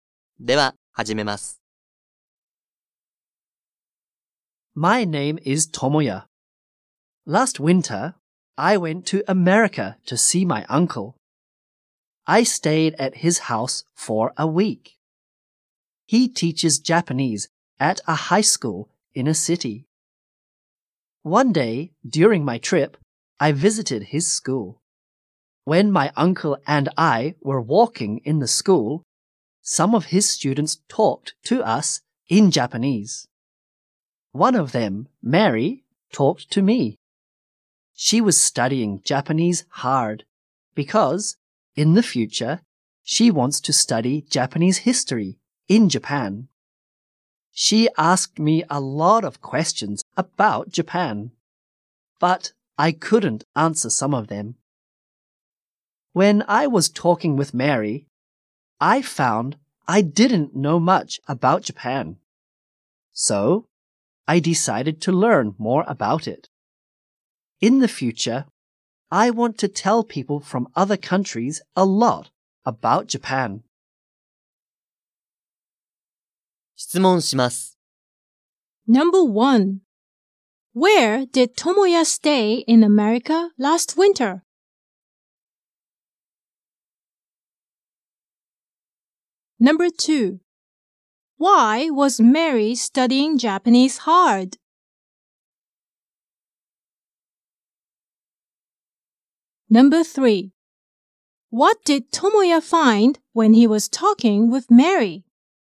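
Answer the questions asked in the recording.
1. At his uncle's house.
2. Because she wants to study Japanese history in Japan in the future.
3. He didn't know much about Japan.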